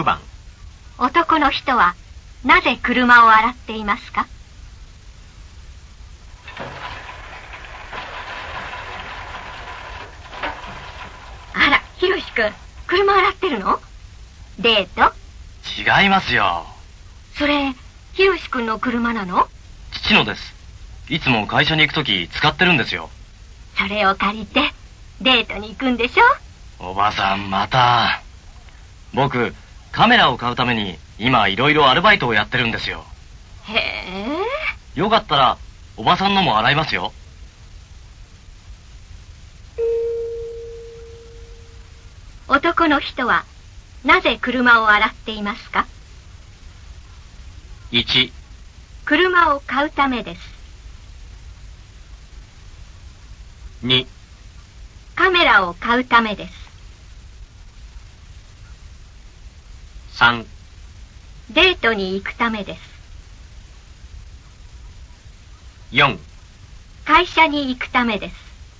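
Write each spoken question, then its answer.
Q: 男の人はなぜ車を洗っていますか?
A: 2: カメラを買うためです。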